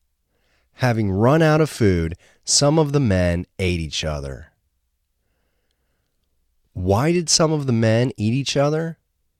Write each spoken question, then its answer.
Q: Why did some of the men eat each other?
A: They ate each other because they ran out of food.